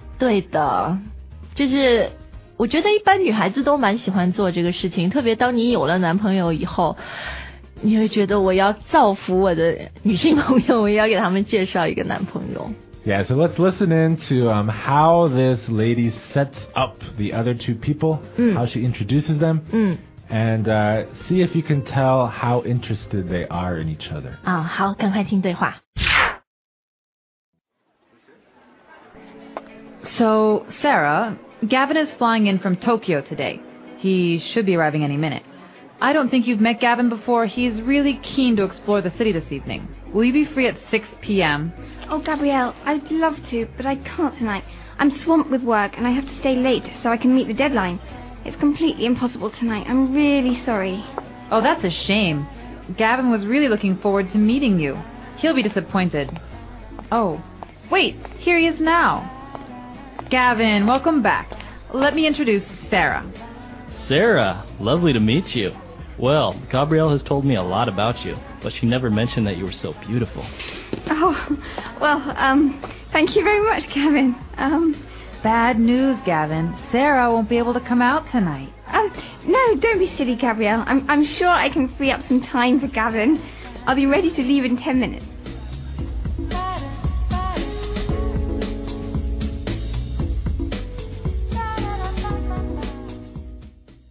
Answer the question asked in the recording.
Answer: She seems pretty interested too, huh?